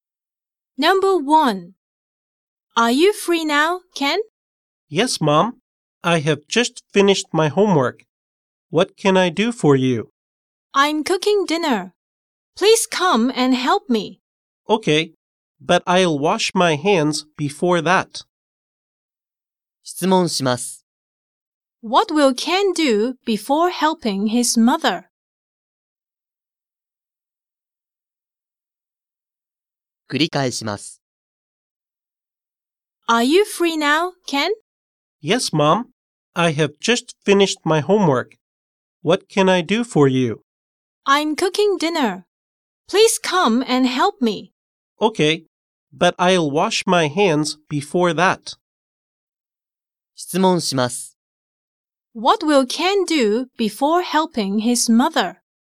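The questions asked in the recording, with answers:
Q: What will Ken do before helping his mother?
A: He will wash his hands.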